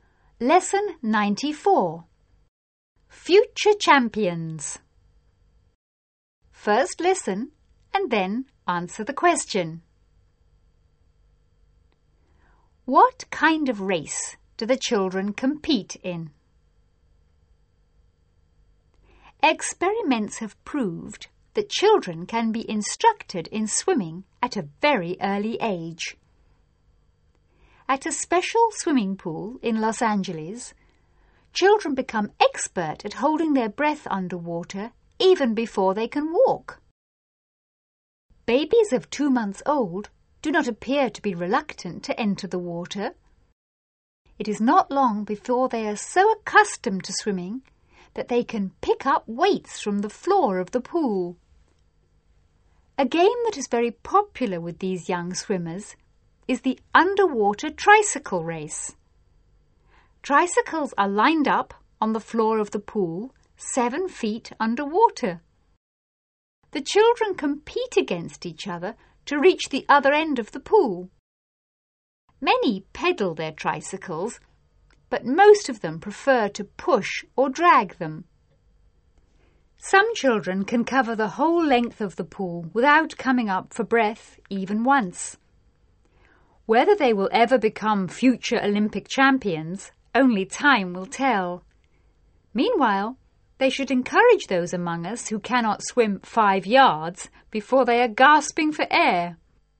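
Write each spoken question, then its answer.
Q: What kind of race do the children compete in?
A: An underwater tricycle race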